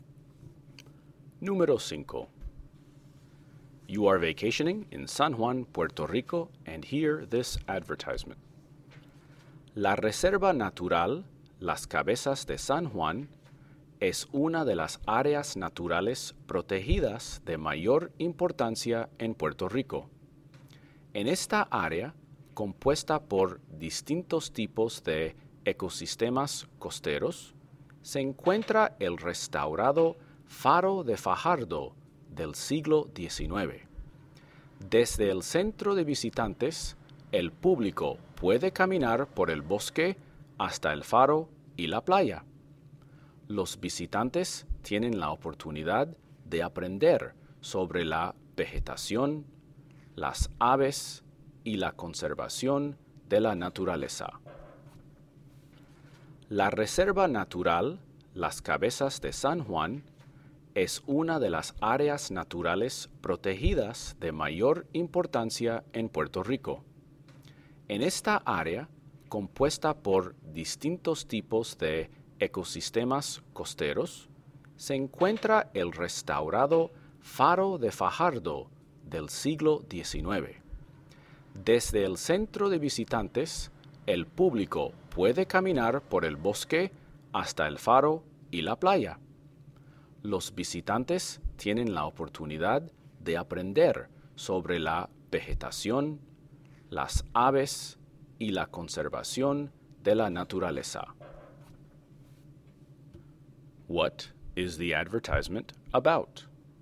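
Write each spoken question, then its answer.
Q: What is the advertisement about?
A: A protected nature reserve (Las Cabezas de San Juan) in Puerto Rico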